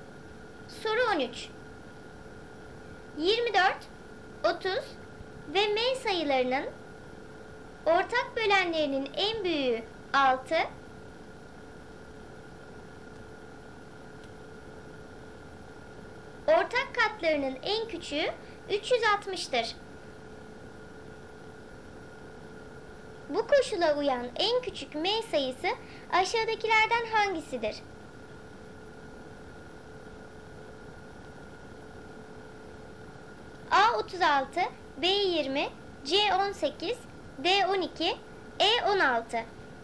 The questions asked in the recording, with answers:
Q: Bu koşula uyan en küçük M sayısı aşağıdakilerden hangisidir?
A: Doğru cevap C 18.